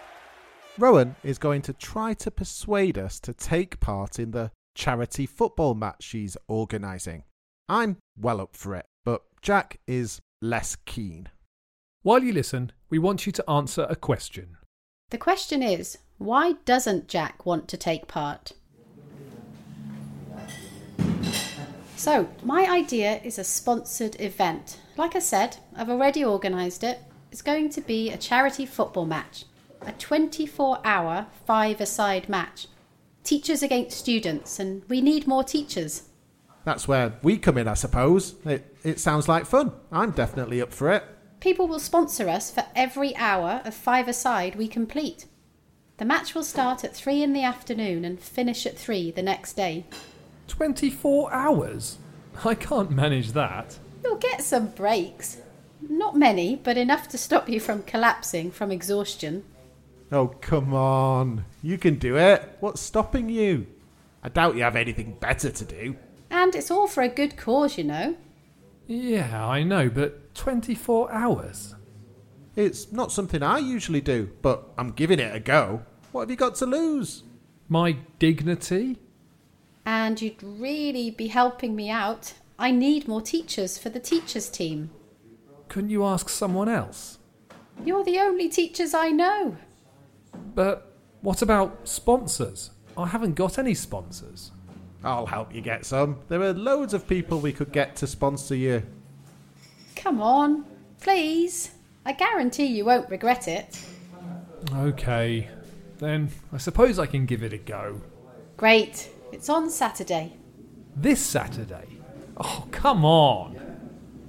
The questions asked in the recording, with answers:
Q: why doesn't Jack want to take part?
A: the main reason he gave was the length of the match.